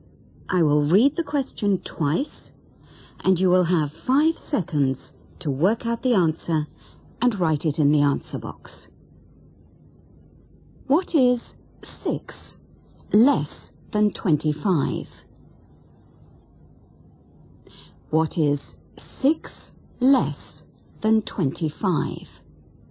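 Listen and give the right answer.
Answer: 19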